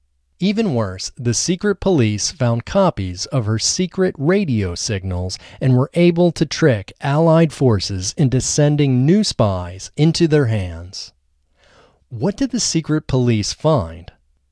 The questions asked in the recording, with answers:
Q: What did the secret police find?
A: The secret police found copies of her secret radio signals.